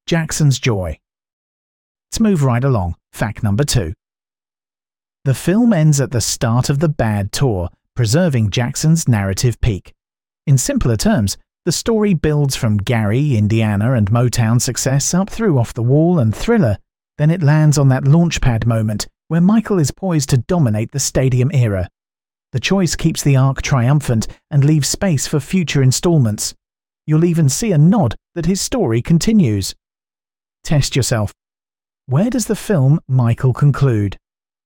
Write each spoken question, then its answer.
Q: Where does the film Michael conclude?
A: Correct answer. At the start of the Bad tour.